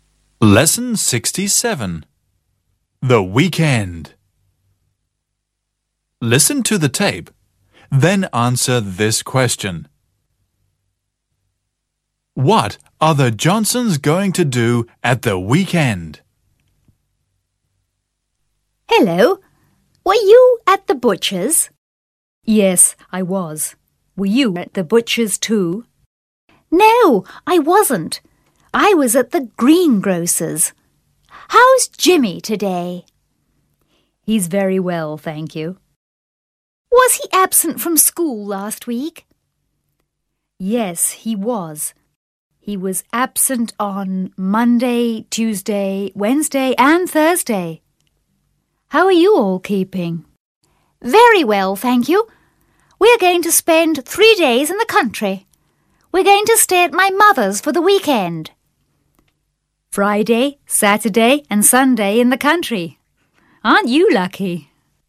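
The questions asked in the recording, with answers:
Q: What are the Johnsons going to do at the weekend?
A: Spend three days in the country at Mrs. Johnson's mother's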